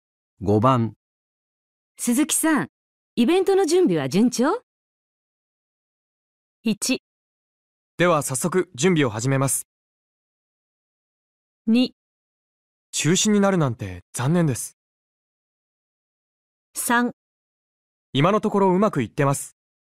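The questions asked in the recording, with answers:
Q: 鈴木さん、イベントの準備は順調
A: 3: 今のところうまくいってます。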